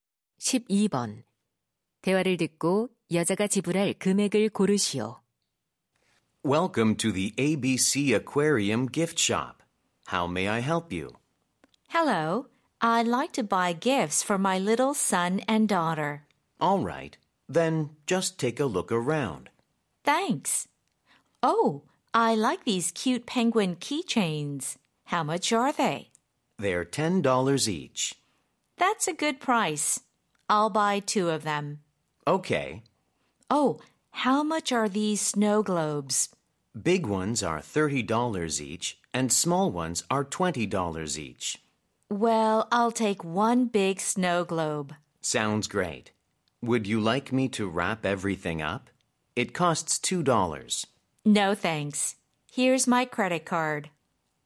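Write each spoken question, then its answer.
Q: 대화를 듣고 여자가 지불할 금액을 고르시오.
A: $50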